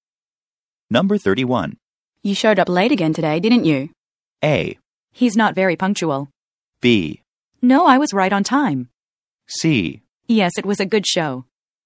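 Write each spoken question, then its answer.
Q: You showed up late again today, didn't you?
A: B: No, I was right on time.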